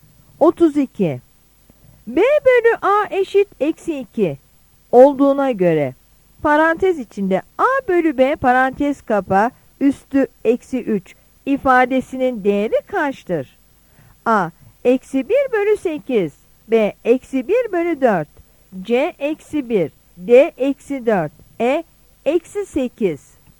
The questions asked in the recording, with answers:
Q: B bölü A eşit eksi 2 olduğuna göre parantez içinde A bölü B parantez kapa üstü eksi 3 ifadesinin değeri kaçtır?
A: Yanıt E'dir.